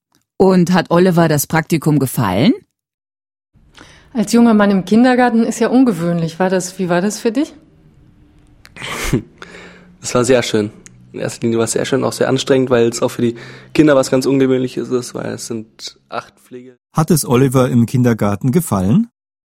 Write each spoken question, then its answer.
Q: Hat es Oliver im Kindergarten gefallen?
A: Ja, sehr.